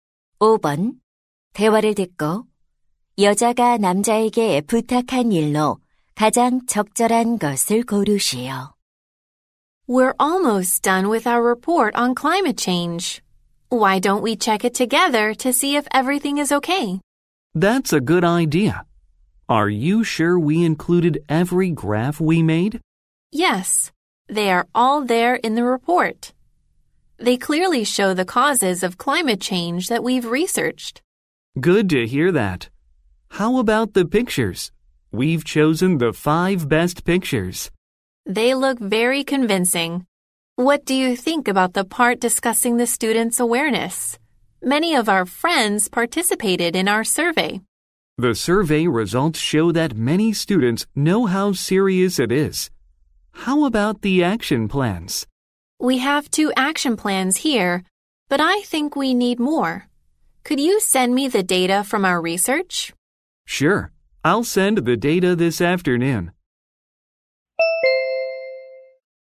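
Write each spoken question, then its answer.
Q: 대화를 듣고 여자가 남자에게 부탁한 일로 가장 적절한 것을 고르시오.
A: 조사 자료 보내주기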